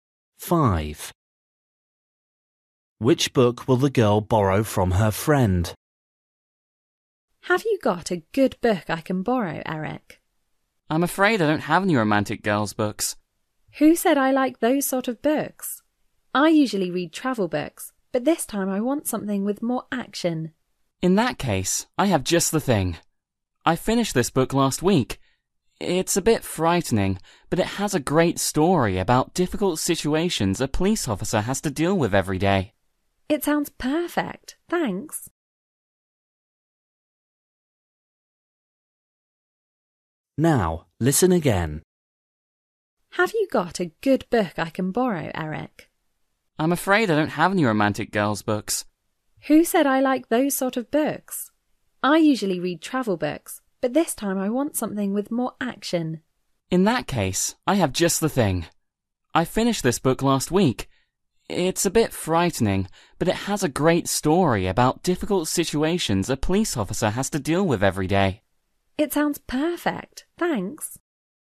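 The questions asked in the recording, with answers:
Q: Which book will the girl borrow from her friend?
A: a book about a police officer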